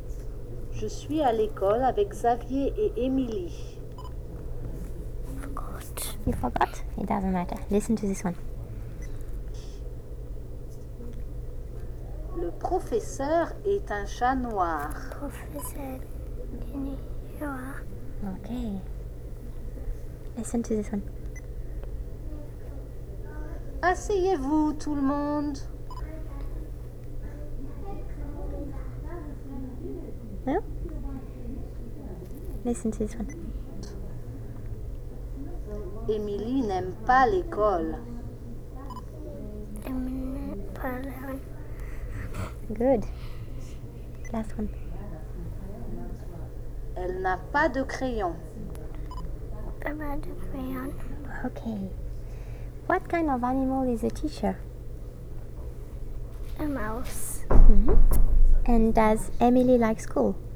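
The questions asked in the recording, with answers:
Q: What kind of animal is a teacher?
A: A black cat

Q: And does Emily like school?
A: No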